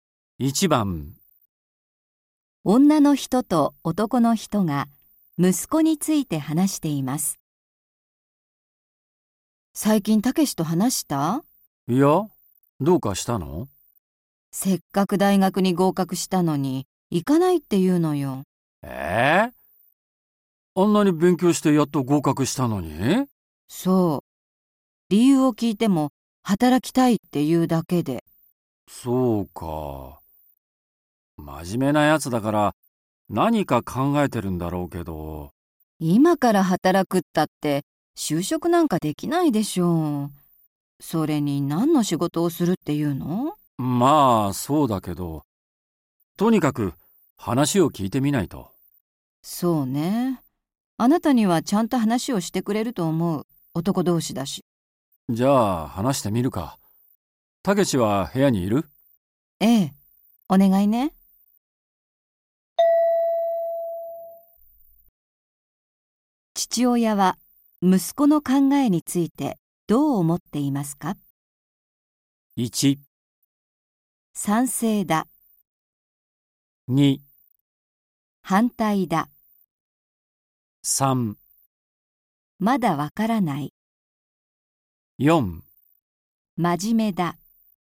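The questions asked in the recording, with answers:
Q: 父親は息子の考えについてどう思っていますか?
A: 3: まだわからない。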